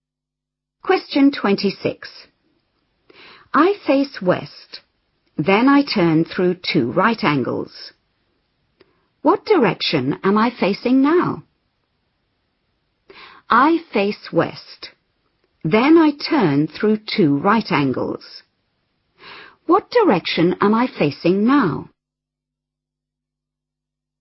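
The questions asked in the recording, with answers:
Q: What direction am I facing now?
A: East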